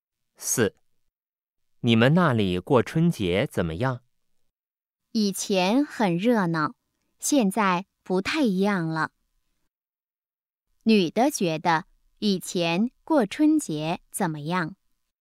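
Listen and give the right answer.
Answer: 很热闹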